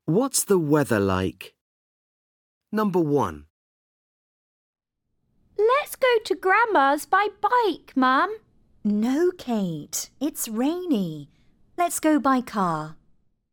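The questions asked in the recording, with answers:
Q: What's the weather like?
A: It's rainy.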